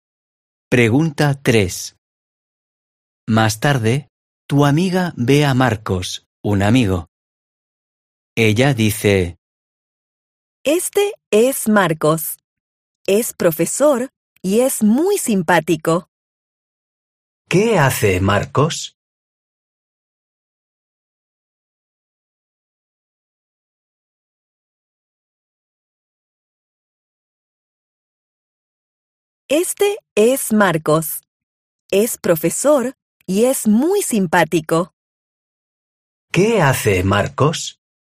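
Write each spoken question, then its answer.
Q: ¿Qué hace Marcos?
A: es profesor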